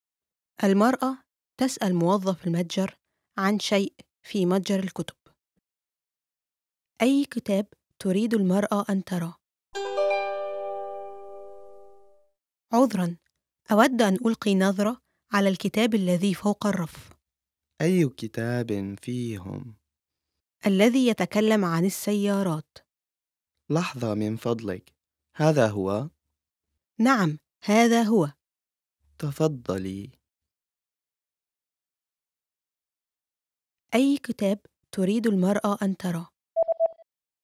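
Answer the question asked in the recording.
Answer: الكتاب الذي يتكلم عن السيارات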